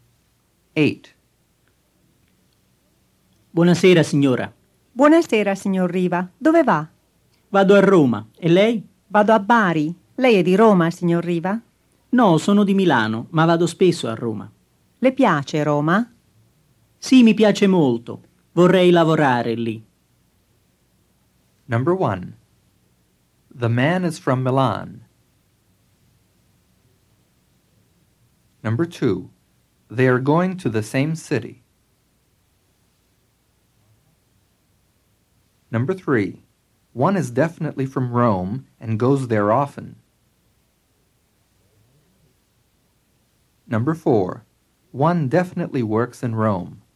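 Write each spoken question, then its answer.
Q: The man is from Milan.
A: True

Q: They are going to the same city.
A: False

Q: One is definitely from Rome and goes there often.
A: False

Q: One definitely works in Rome.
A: False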